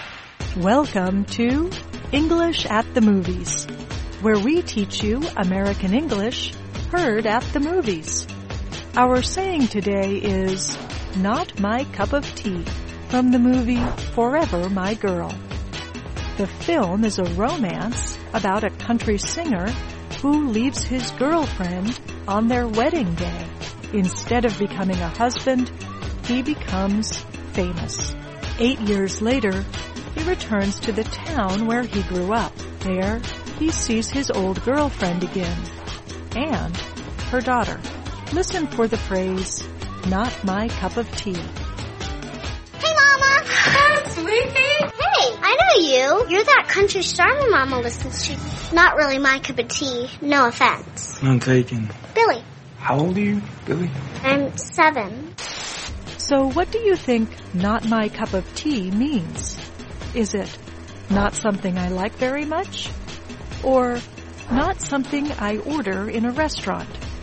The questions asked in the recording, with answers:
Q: So what do you think not my cup of tea means?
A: Not my cup of tea means not something I like very much.